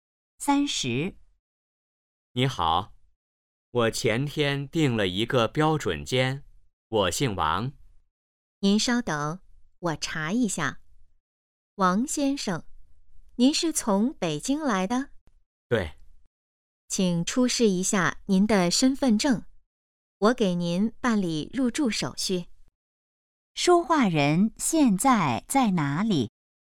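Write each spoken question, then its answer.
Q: 说话人现在在哪里?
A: 宾馆(酒店)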